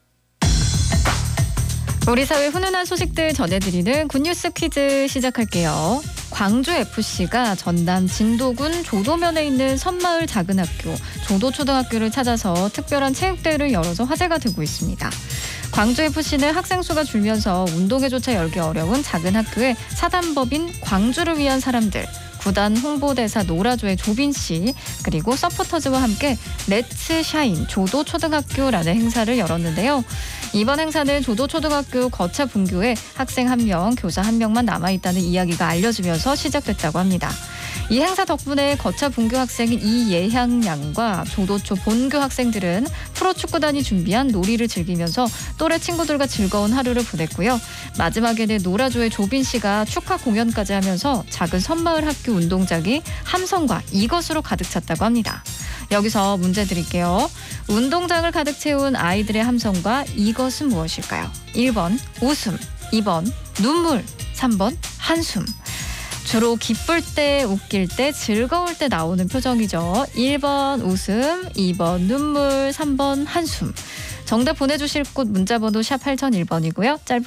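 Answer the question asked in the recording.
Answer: 1번: 웃음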